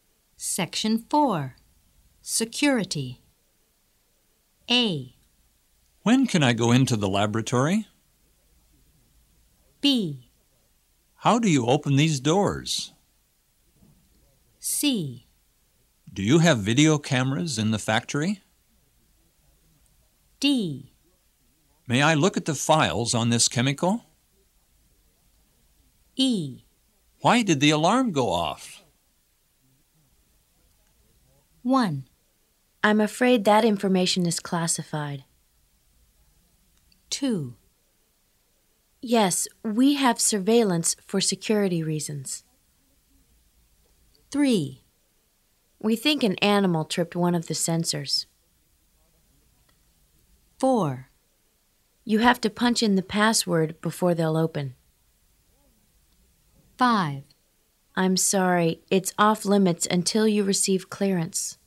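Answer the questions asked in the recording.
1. D: May I look at the files on this chemical?
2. C: Do you have video cameras in the factory?
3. E: Why did the alarm go off?
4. B: How do you open these doors?
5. A: When can I go into the laboratory?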